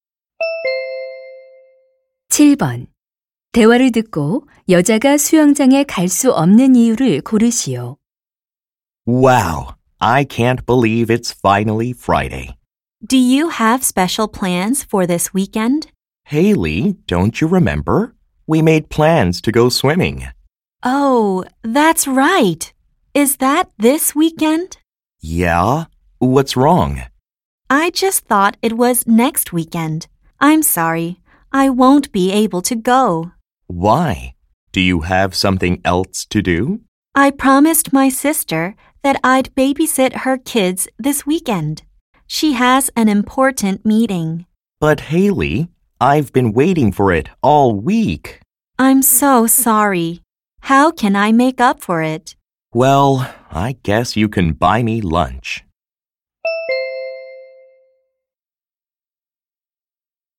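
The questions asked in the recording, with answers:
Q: 대화를 듣고 여자가 수영장에 갈 수 없는 이유를 고르시오.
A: 언니(여동생)의 아이들을 돌봐야 해서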